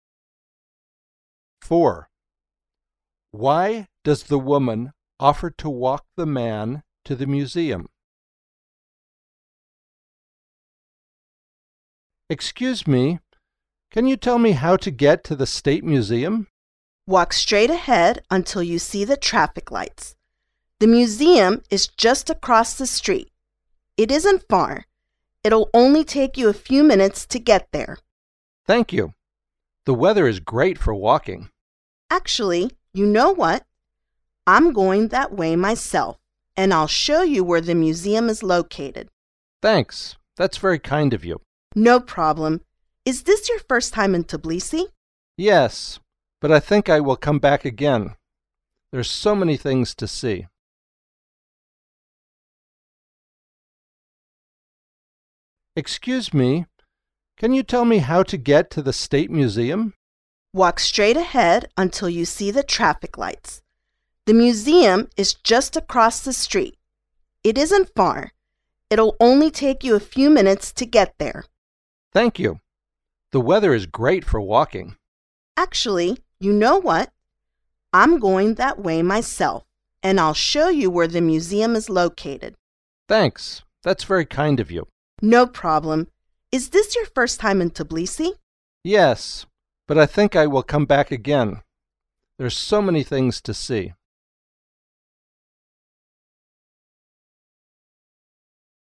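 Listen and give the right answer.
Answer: She is going that way herself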